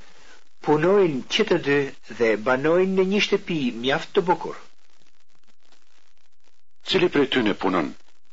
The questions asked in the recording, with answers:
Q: Cili prej tyre punon?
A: Që të dy punojnë.